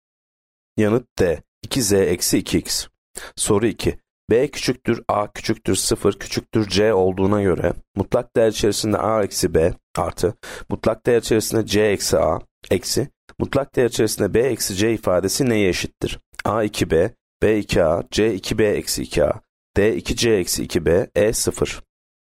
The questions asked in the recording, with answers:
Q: B küçüktür, A küçüktür, 0 küçüktür, C olduğuna göre mutlak değer içerisinde A eksi B artı mutlak değer içerisinde C eksi A eksi mutlak değer içerisinde B eksi C ifadesi neye eşittir?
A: Yanıt E 0.